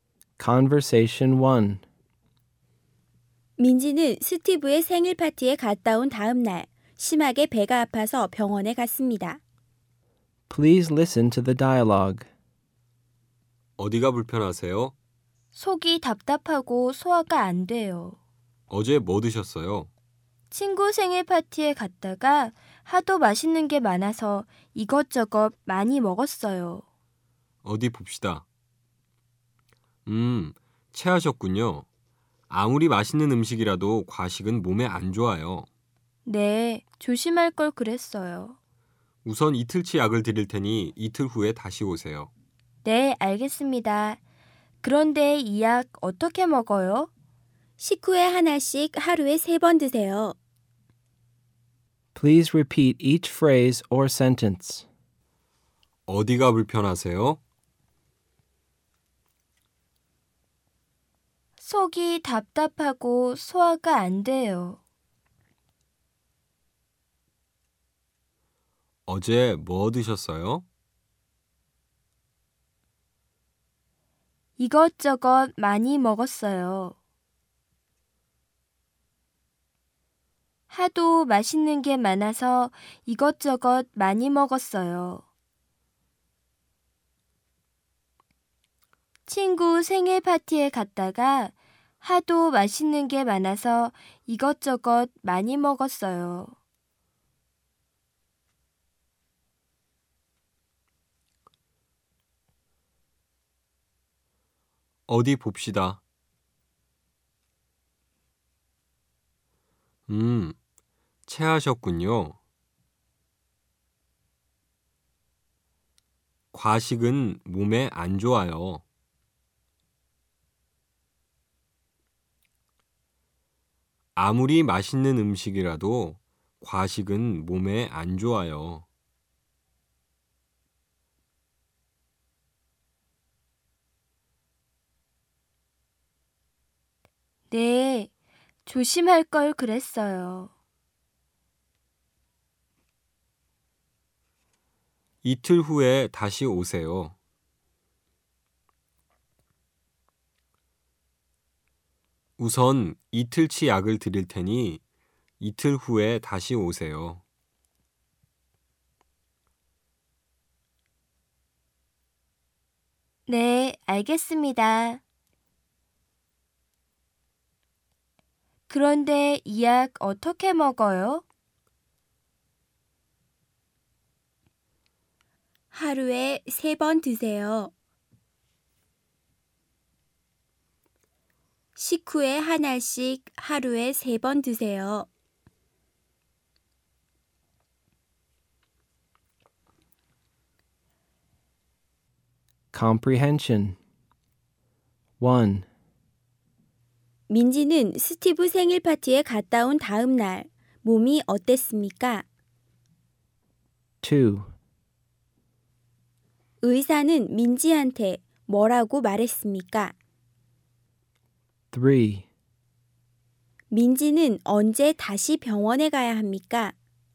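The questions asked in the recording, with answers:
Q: 민지는 스티브 생일 파티에 갔다 온 다음 날 몸이 어땠습니까?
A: 심하게 배가 아프고 속이 답답하고 소화가 안 됐습니다.

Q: 의사는 민지한테 뭐라고 말했습니까?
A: 체했다고, 아무리 맛있는 음식이라도 과식은 몸에 안 좋다고 말했습니다.

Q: 민지는 언제 다시 병원에 가야 합니까?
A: 이틀 후에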